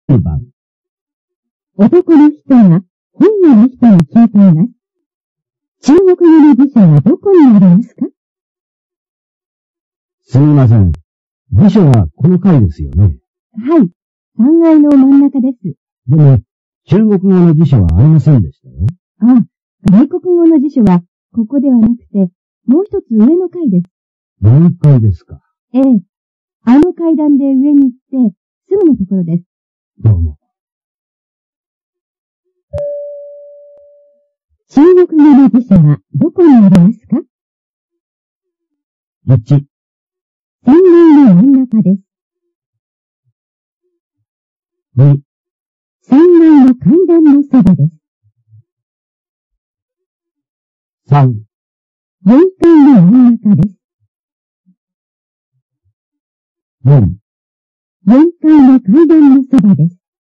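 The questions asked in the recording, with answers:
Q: 中国語の辞書はどこにありますか?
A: 4: 4階の階段のそばです。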